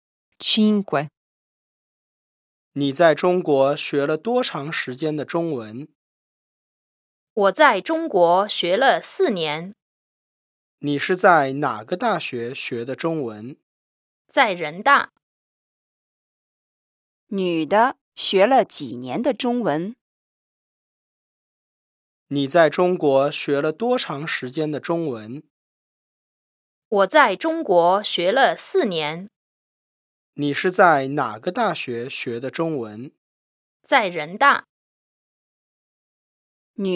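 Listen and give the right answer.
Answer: 4年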